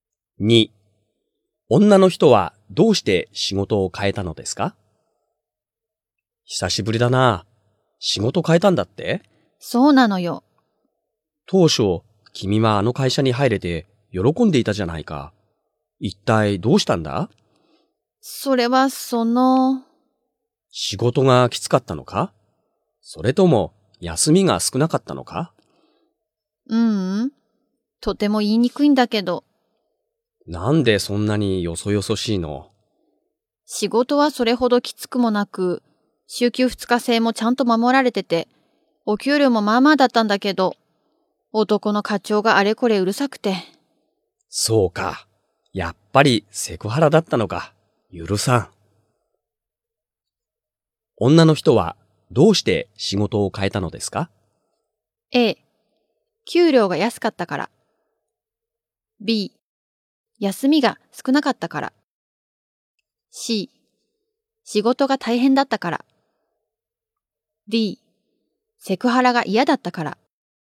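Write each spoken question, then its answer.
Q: 女の人はどうして仕事を変えたのですか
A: D: セクハラが嫌だったから。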